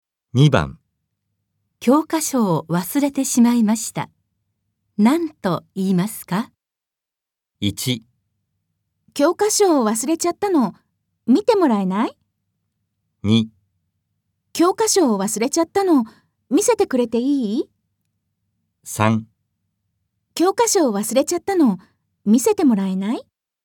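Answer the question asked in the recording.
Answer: 3: 教科書を忘れちゃったの、見せてもらえない?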